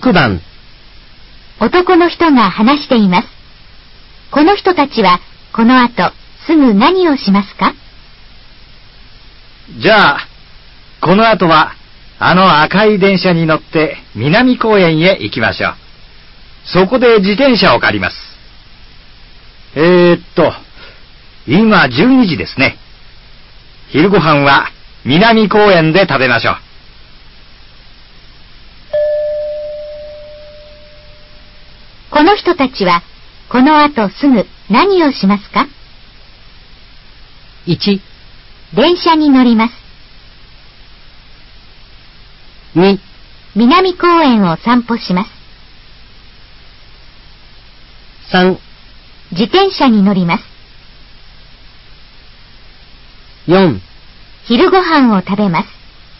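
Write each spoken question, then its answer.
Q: この人たちはこの後すぐ何をしますか?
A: 1: 電車に乗ります。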